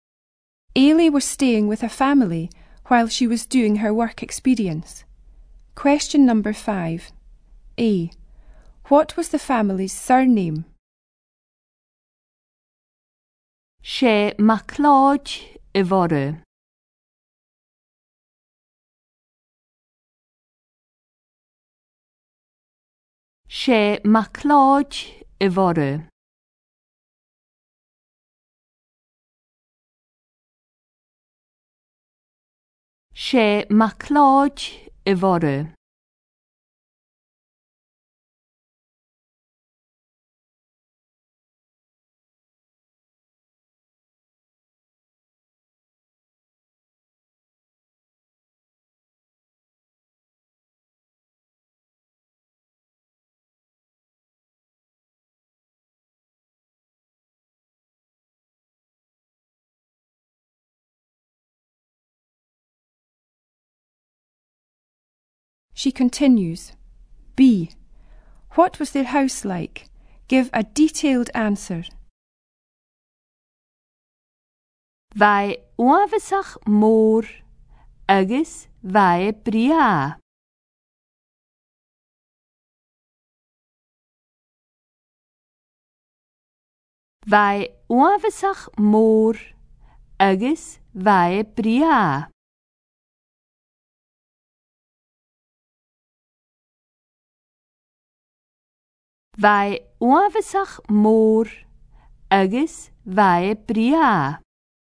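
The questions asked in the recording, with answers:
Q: What was the family's surname?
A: MacLeod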